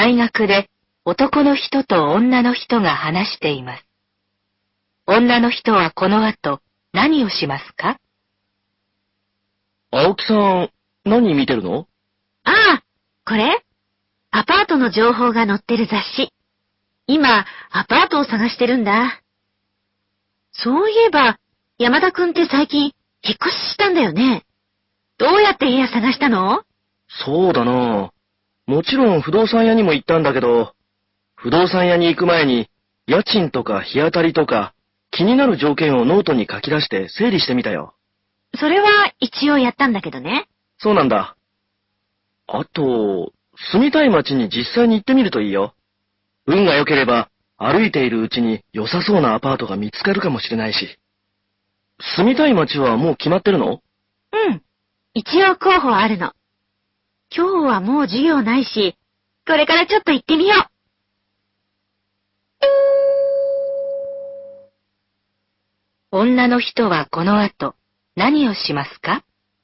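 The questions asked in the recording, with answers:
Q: 女の人はこの後何をしますか?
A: 住みたい街に実際に行ってみる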